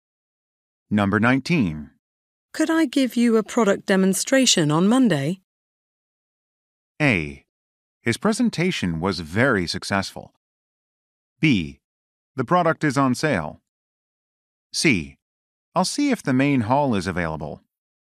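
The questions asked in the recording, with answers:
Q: Could I give you a product demonstration on Monday?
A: C: I'll see if the main hall is available.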